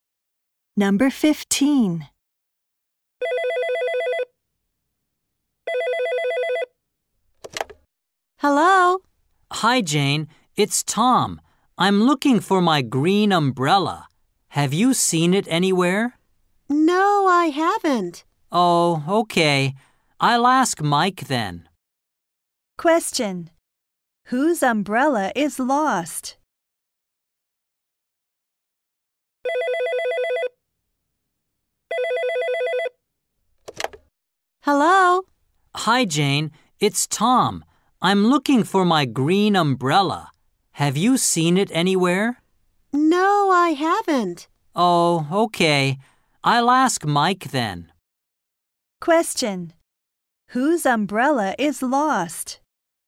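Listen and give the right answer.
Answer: Tom's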